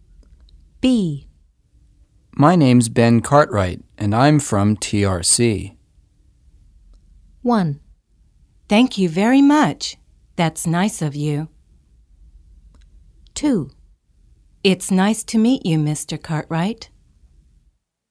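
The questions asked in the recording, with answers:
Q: My name's Ben Cartwright, and I'm from TRC.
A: 2: It's nice to meet you, Mr. Cartwright.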